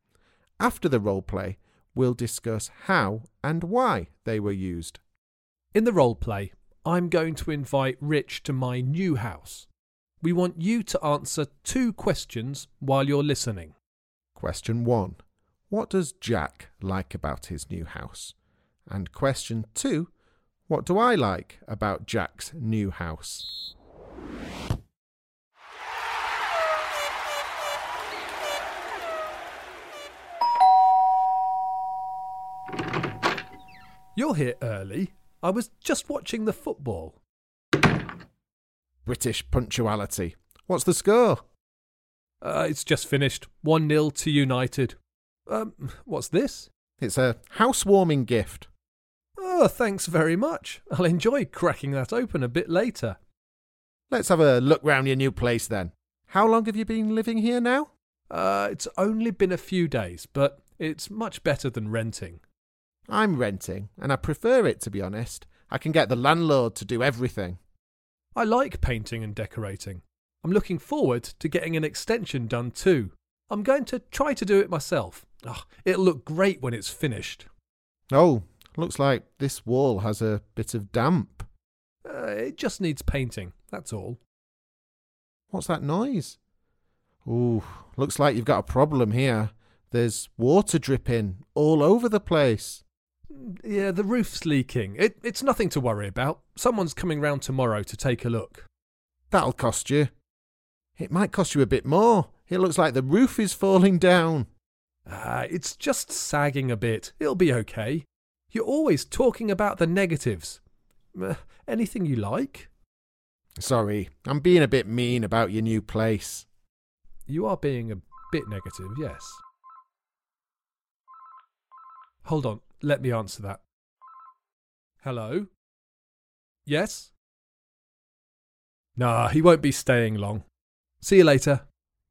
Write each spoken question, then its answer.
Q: what do I like about Jack's new house?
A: Well, nothing really.